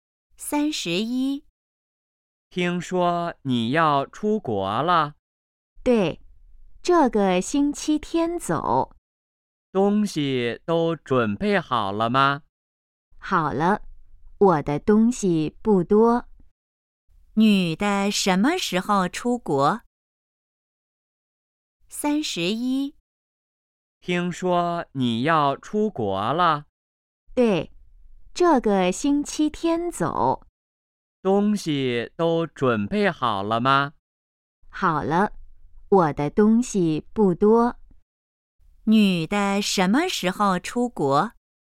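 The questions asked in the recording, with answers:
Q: 女的什么时候出国?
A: 这个星期天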